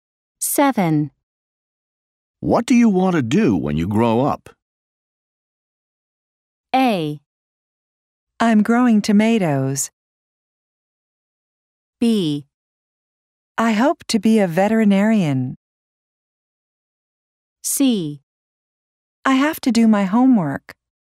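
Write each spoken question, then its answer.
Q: What do you want to do when you grow up?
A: B: I hope to be a veterinarian.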